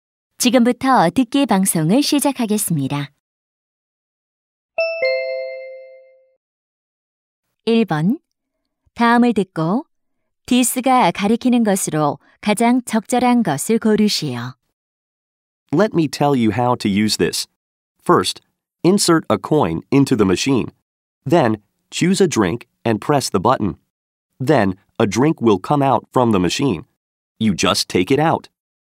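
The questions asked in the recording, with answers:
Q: 다음을 듣고 디스가 가리키는 것으로 가장 적절한 것을 고르시오.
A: 자판기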